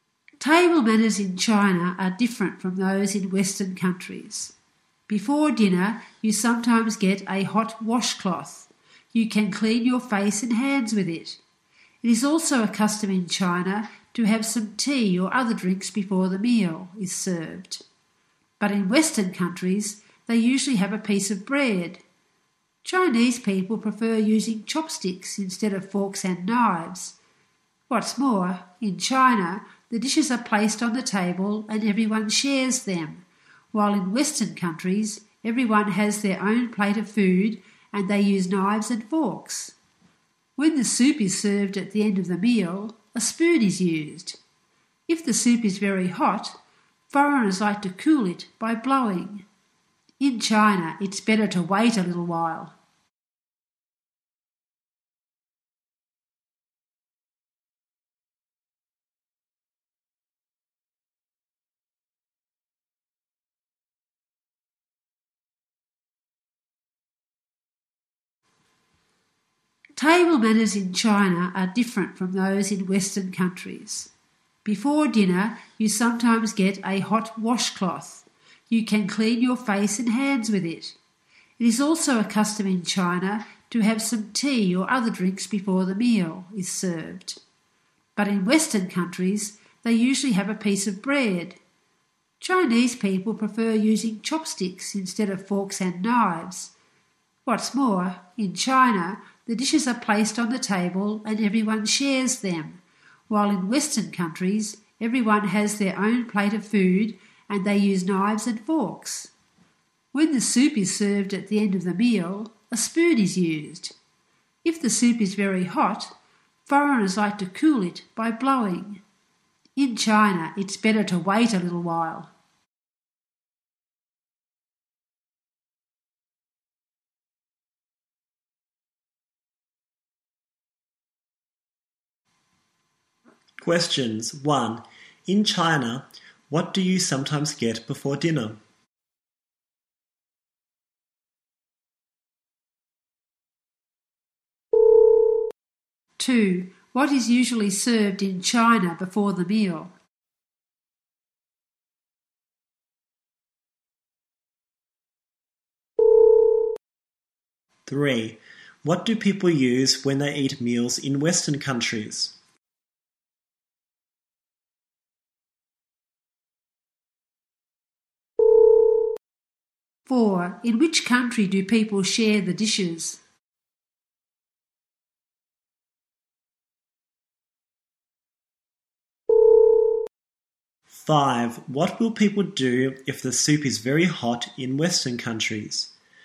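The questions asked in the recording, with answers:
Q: In China, what do you sometimes get before dinner?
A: A hot washcloth.

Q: What is usually served in China before the meal?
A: Tea or other drinks.

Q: What do people use when they eat meals in Western countries?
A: Knives and forks.

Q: In which country do people share the dishes?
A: China.

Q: What will people do if the soup is very hot in Western countries?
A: Cool it by blowing.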